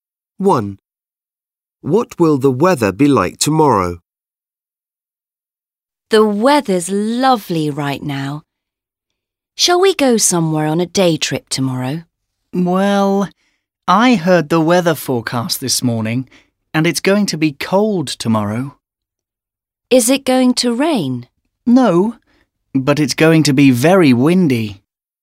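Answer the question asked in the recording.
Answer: cold and very windy, but no rain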